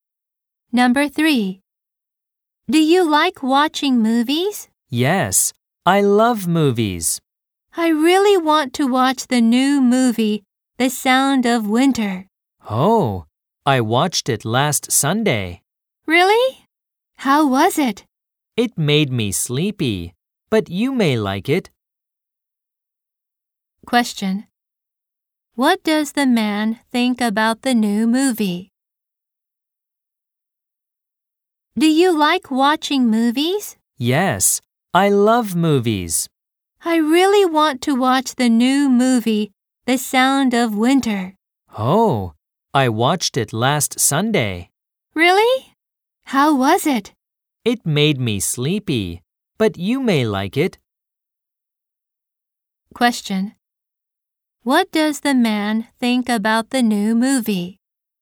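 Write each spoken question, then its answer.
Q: What does the man think about the new movie?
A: It made him sleepy (it was boring)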